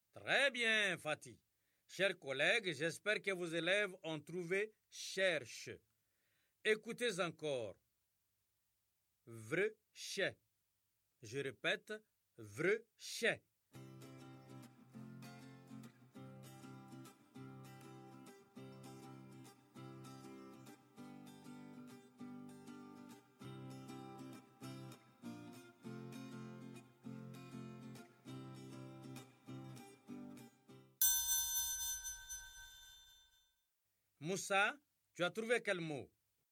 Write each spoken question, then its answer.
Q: Moussa, tu as trouvé quel mot?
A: Monsieur, c'est chèvre.